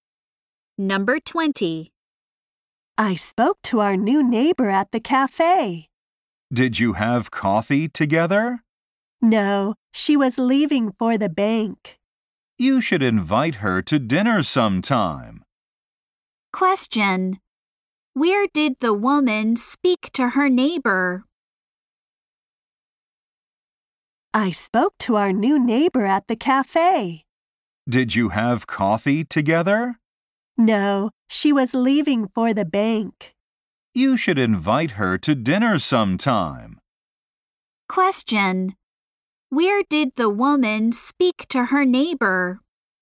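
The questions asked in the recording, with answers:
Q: Where did the woman speak to her neighbor?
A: At the cafe.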